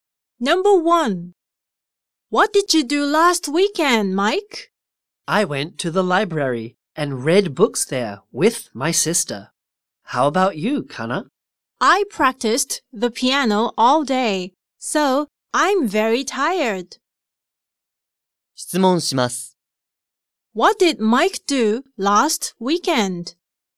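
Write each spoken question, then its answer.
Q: What did Mike do last weekend?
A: He went to the library and read books there with his sister.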